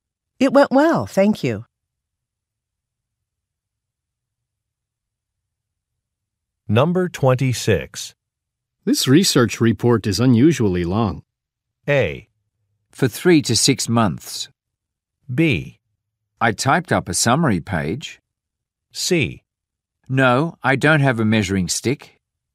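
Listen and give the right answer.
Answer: B: I typed up a summary page.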